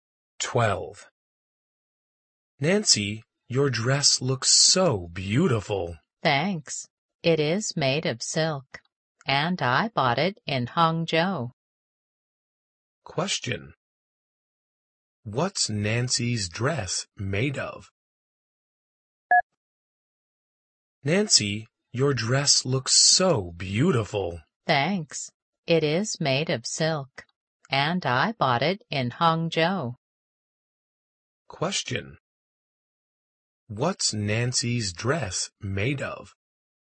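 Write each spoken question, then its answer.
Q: What's Nancy's dress made of?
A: Silk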